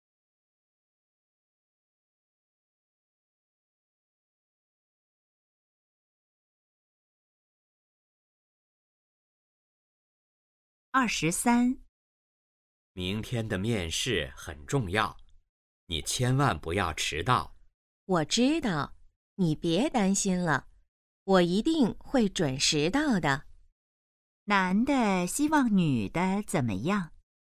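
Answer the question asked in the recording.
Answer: 面试不要迟到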